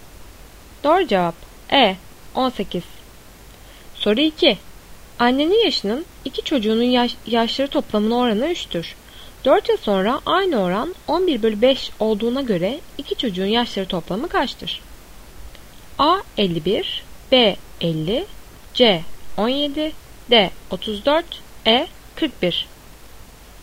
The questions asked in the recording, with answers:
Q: 4 yıl sonra aynı oran 11/5 olduğuna göre iki çocuğun yaşları toplamı kaçtır?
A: Doğru cevap C 17.